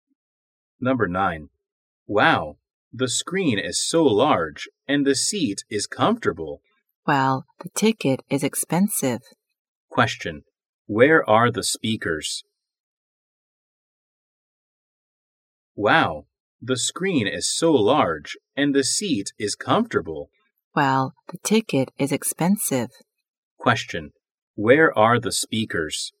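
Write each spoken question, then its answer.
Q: where are the speakers?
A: In a cinema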